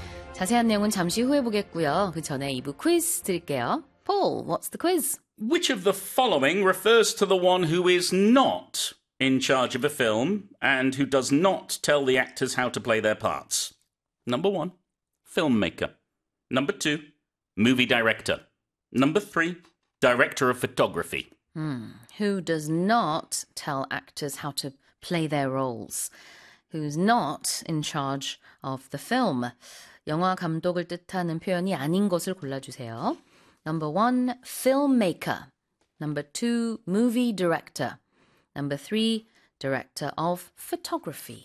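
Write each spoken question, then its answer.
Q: Which of the following refers to the one who is not in charge of a film and who does not tell the actors how to play their parts?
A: 3: director of photography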